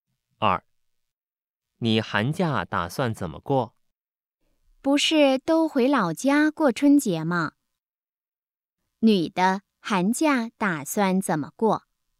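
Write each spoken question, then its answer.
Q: 女的寒假打算怎么过?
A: 回老家过春节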